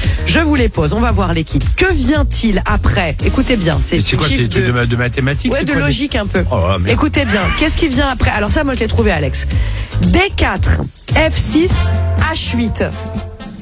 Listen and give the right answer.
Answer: Bah, J10.